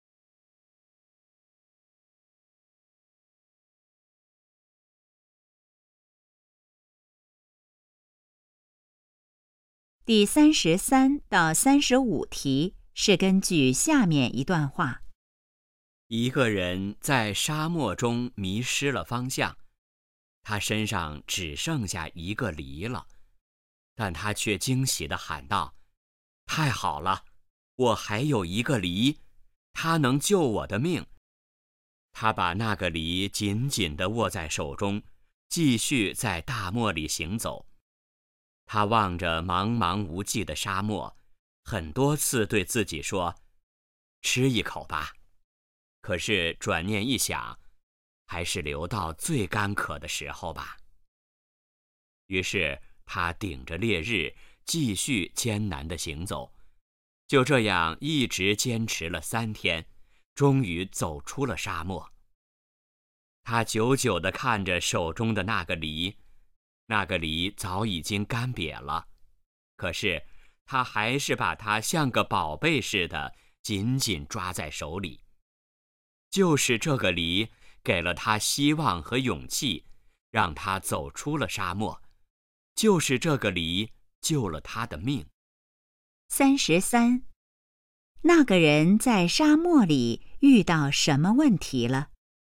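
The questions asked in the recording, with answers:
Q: 那个人在沙漠里遇到什么问题了?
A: 迷失了方向

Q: 那个人为什么不吃梨?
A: 想留到最干渴的时候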